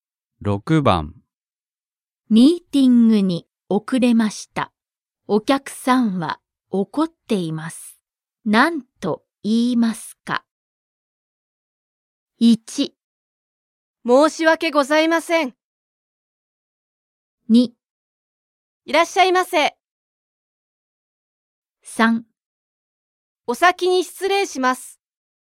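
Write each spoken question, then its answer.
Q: 何と言いますか?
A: 1: 申し訳ございません。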